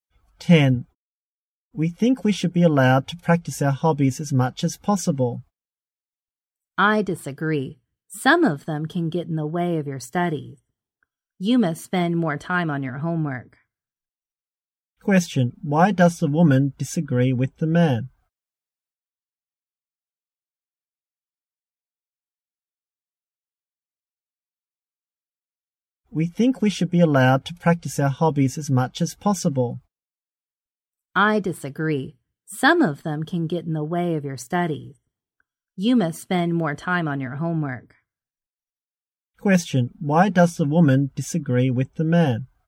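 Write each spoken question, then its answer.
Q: Question, why does the woman disagree with the man?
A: Some hobbies can get in the way of their studies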